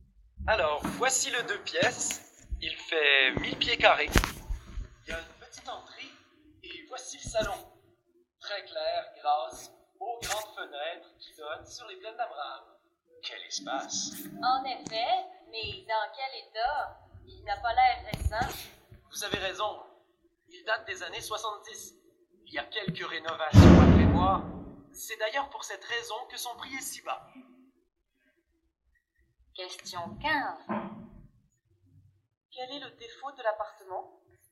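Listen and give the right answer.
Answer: Il est ancien et a besoin de rénovations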